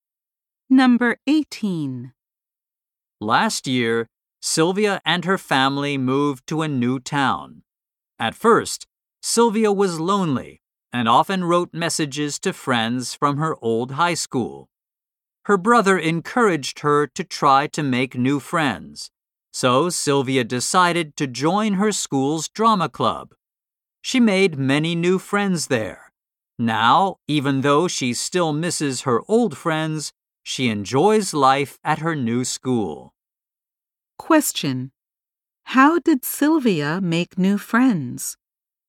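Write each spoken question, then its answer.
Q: How did Sylvia make new friends?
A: She joined her school's drama club.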